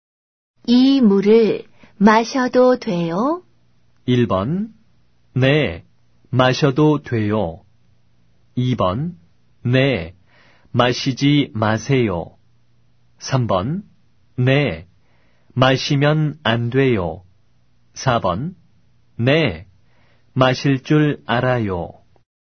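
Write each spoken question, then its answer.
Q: 이 물을 마셔도 돼요?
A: 1: 네, 마셔도 돼요.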